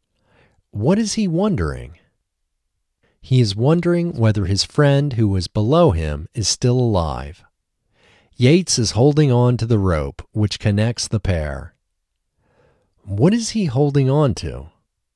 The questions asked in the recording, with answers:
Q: What is he holding on to?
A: He is holding on to the rope.